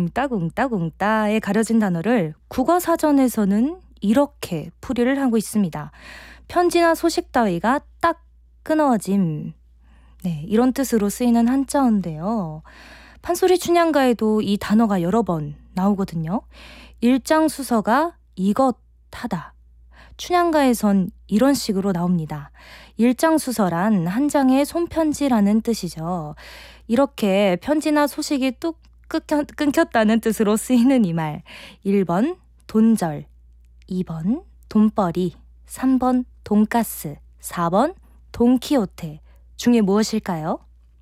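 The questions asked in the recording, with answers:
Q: 1번 돈절, 2번 돈벌이, 3번 돈가스, 4번 돈키호테 중에 무엇일까요?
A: 1: 돈절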